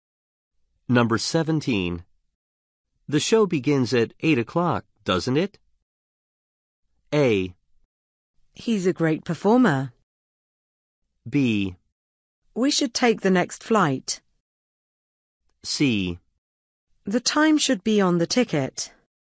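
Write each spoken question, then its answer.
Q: The show begins at 8 o'clock, doesn't it?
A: C: The time should be on the ticket.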